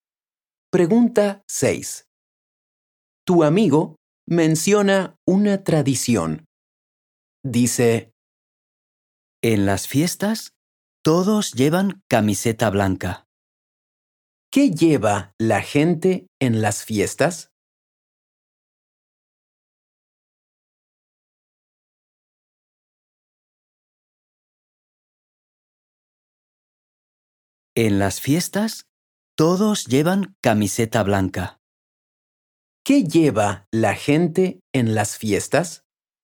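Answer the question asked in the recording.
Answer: Camiseta blanca.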